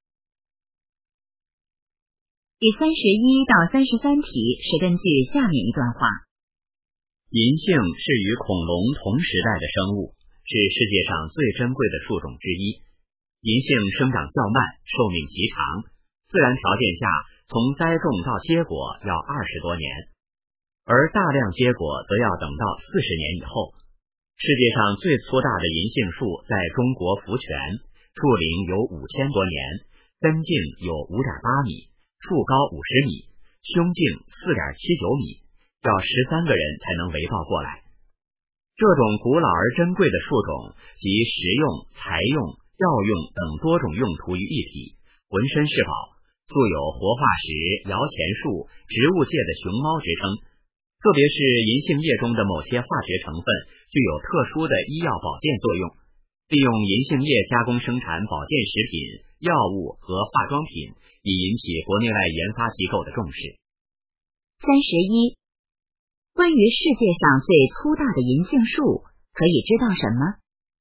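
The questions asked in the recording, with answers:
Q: 关于世界上最粗大的银杏树,可以知道什么?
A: 在中国福泉,树龄5000多年,要13个人才能围抱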